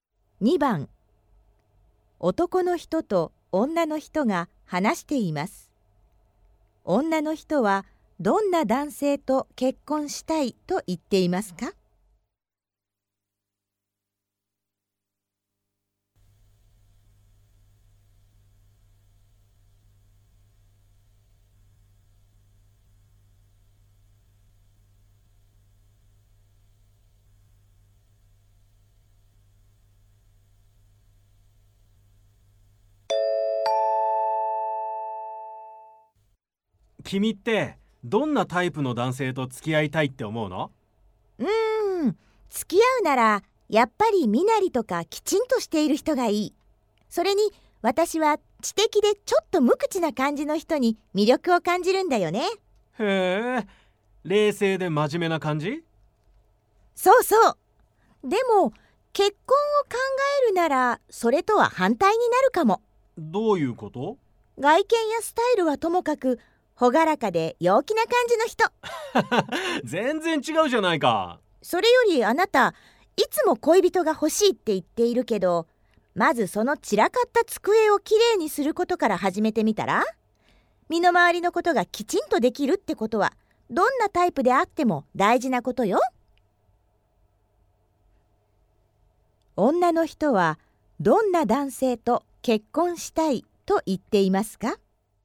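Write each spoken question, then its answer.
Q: 女の人はどんな男性と結婚したいと言っていますか?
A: ほがらかで陽気な感じの人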